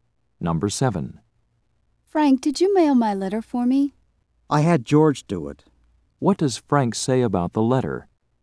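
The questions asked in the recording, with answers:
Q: What does Frank say about the letter?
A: George mailed it.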